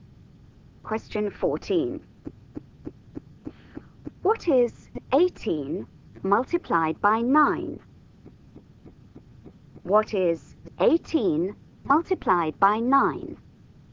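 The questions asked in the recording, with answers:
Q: What is 18 multiplied by 9?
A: 162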